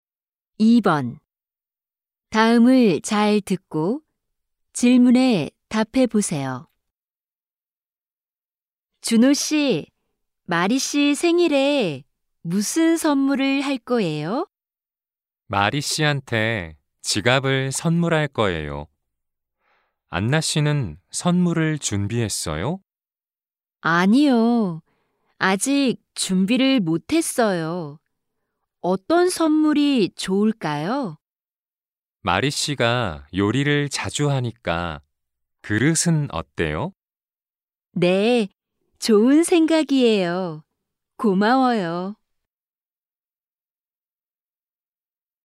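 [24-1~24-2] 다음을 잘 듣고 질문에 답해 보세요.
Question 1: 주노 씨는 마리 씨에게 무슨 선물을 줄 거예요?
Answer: 지갑

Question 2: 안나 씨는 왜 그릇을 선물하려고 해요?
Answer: 마리 씨가 요리를 자주 해서

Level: 1B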